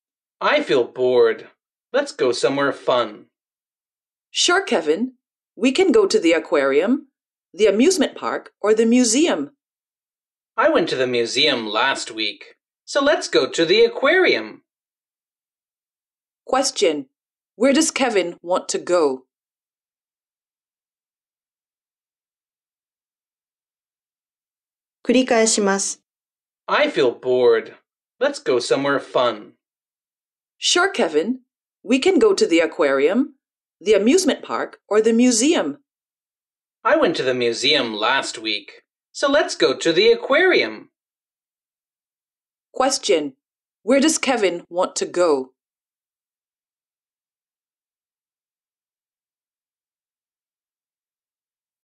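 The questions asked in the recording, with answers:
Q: Where does Kevin want to go?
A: To the aquarium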